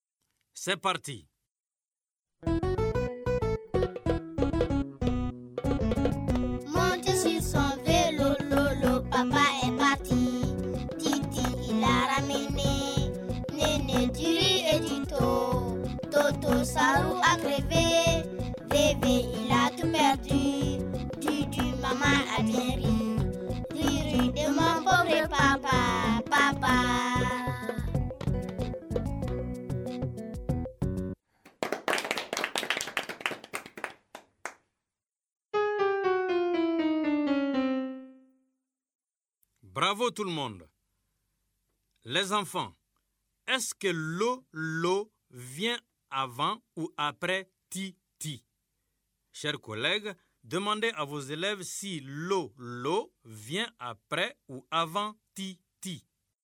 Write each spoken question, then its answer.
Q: Les enfants, est-ce que lolo vient avant ou après titi?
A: Monsieur, lolo vient avant titi.